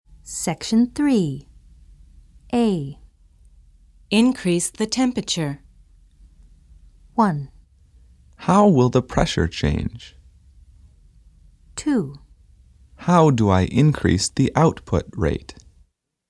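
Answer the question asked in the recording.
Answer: 2: How do I increase the output rate?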